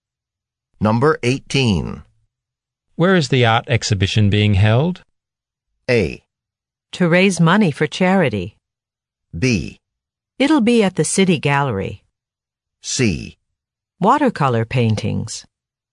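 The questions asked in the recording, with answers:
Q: Where is the art exhibition being held?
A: B: It'll be at the City Gallery.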